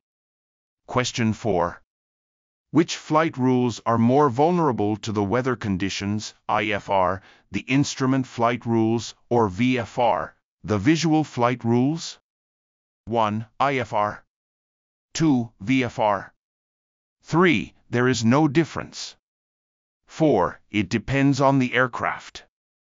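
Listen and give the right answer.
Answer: 2: VFR.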